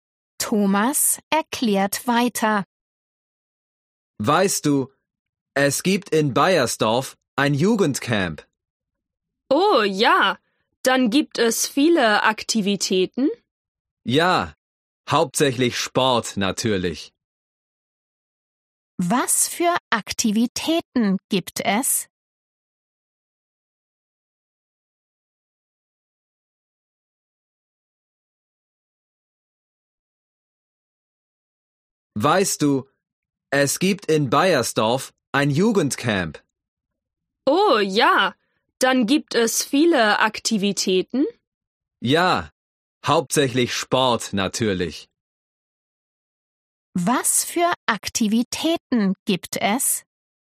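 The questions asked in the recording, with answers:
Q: Was für Aktivitäten gibt es?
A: Hauptsächlich Sport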